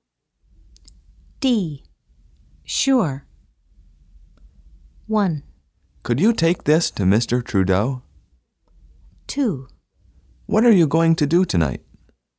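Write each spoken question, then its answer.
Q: Sure.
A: 1: Could you take this to Mr. Trudeau?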